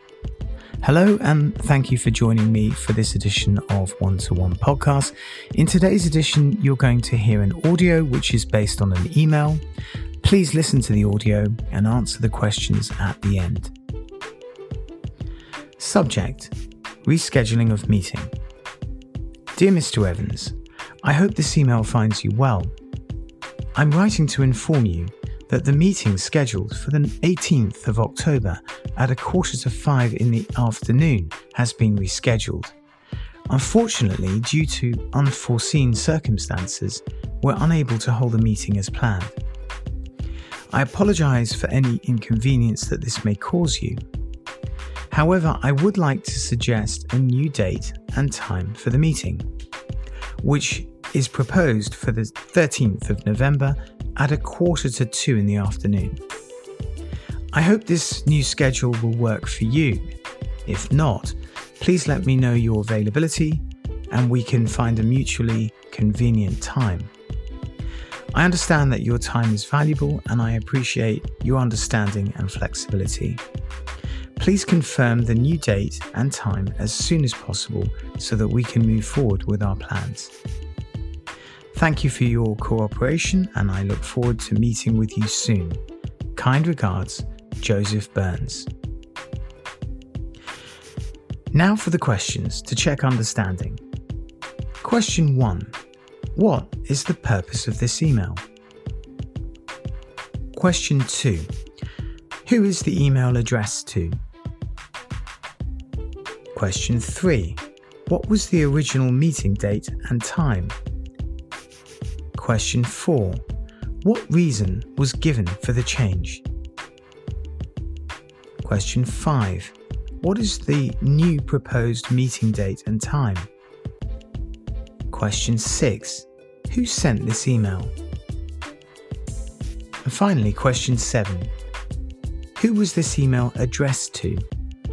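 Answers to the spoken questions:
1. To inform that the meeting has been rescheduled
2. Mr. Evans
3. 18th of October at 4:45 in the afternoon
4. Unforeseen circumstances
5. 13th of November at 1:45 in the afternoon
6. Joseph Burns
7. Mr. Evans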